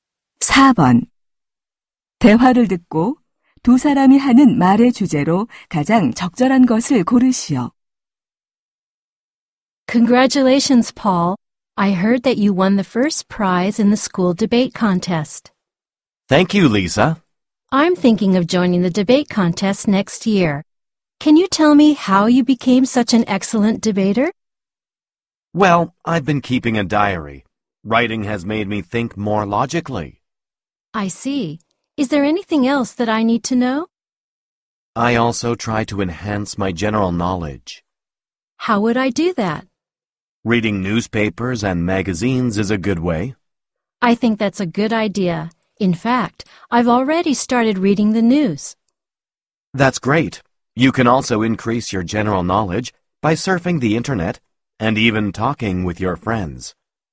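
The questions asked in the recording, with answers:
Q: 대화를 듣고 두 사람이 하는 말의 주제로 가장 적절한 것을 고르시오.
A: 토론 실력을 향상시키는 방법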